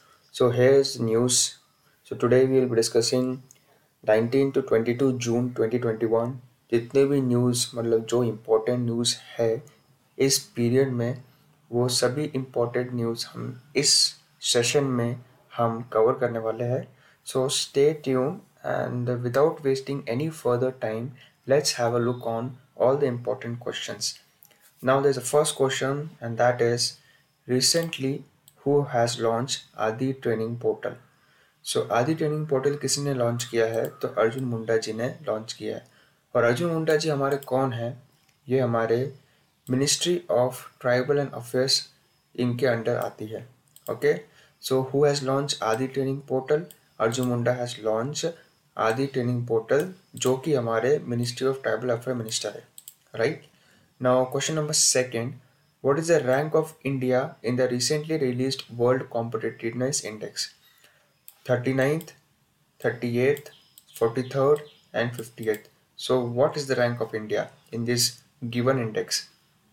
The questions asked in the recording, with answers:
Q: What is the rank of India in the recently released World Competitiveness Index?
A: So, your answer is 43rd.